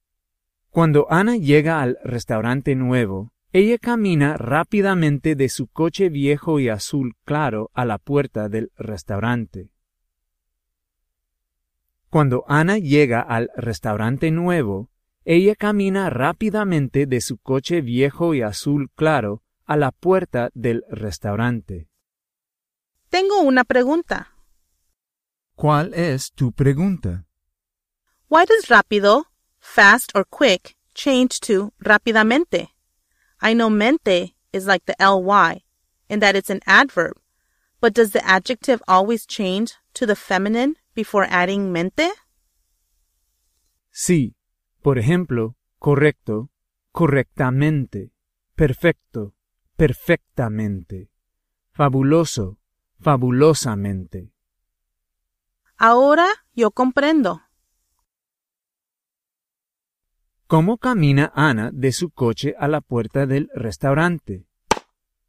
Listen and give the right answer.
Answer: Rápidamente.